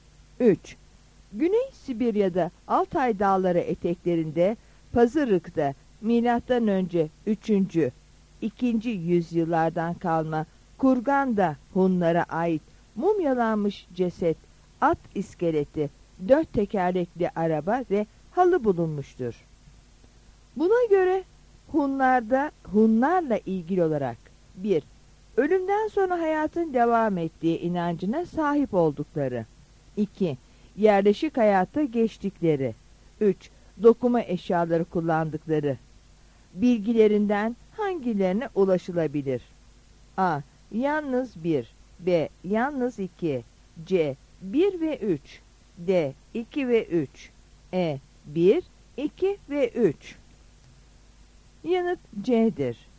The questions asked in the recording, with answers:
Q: Dokuma eşyaları kullandıkları bilgilerinden hangilerine ulaşılabilir?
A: Yanıt C'dir.